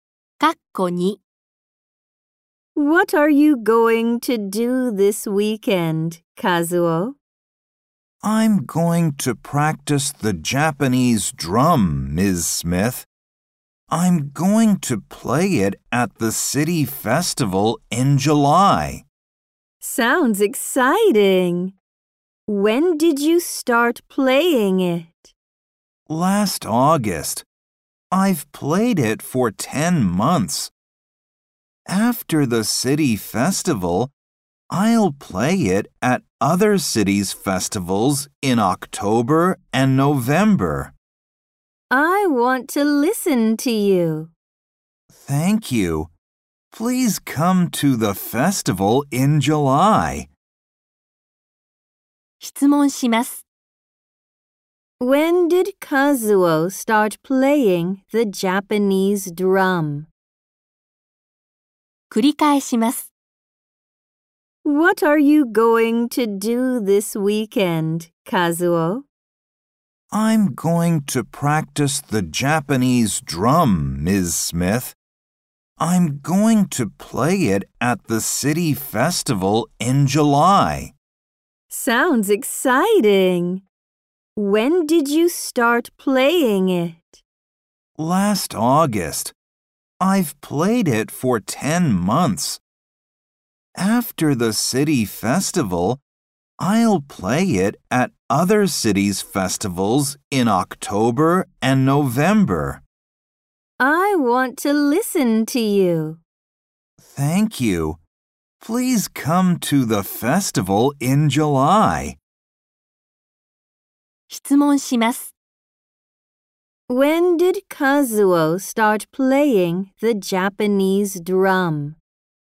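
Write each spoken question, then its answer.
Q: When did Kazuo start playing the Japanese drum?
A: Last August.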